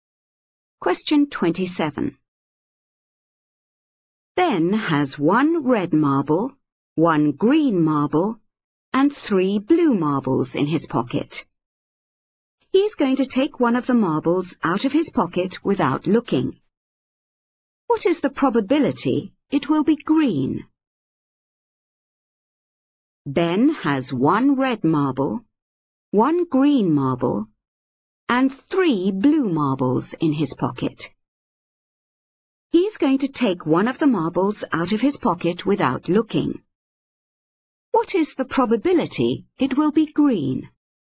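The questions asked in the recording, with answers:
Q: What is the probability it will be green?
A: 1/5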